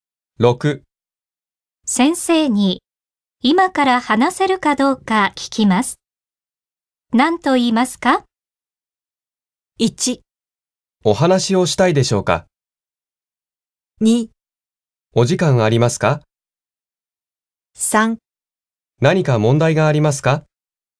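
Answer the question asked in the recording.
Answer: 2: お時間ありますか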